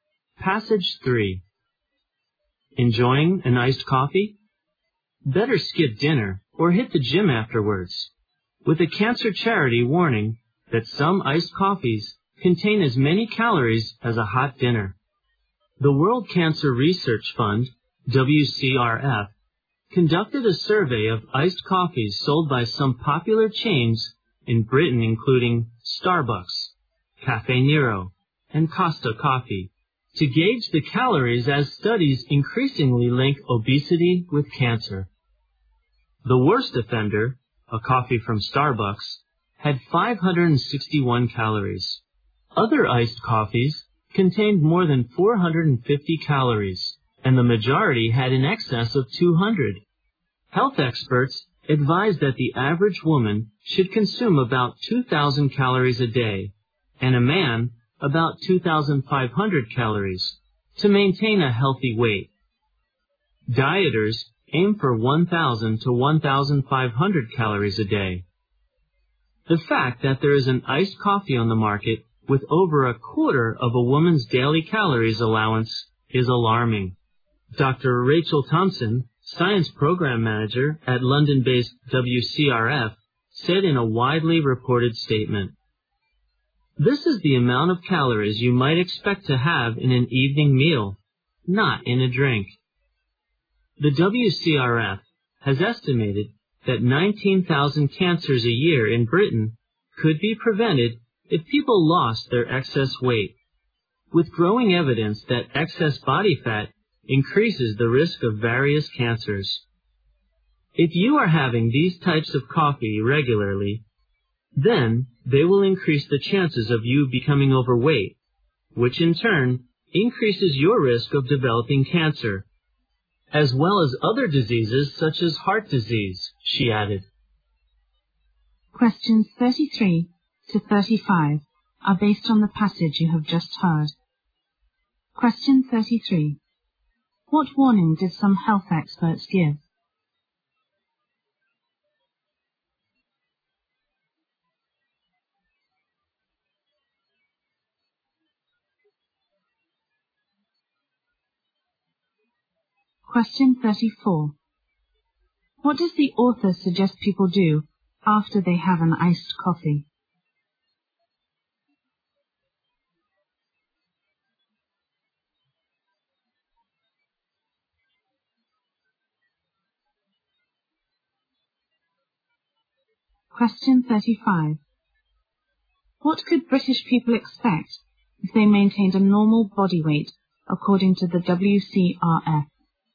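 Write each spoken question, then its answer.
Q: What warning did some health experts give?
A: Some iced coffees contain as many calories as a hot dinner.

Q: What does the author suggest people do after they have an iced coffee?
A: Skip dinner or go to the gym.

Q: What could British people expect if they maintained a normal body weight according to the WCRF?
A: 19,000 cancers a year could be prevented.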